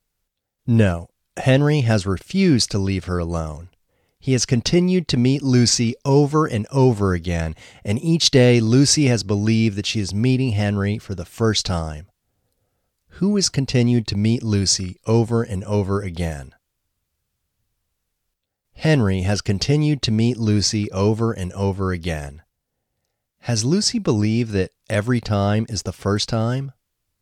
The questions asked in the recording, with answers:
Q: Has Lucy believed that every time is the first time?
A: Yes, Lucy has believed that every time is the first time.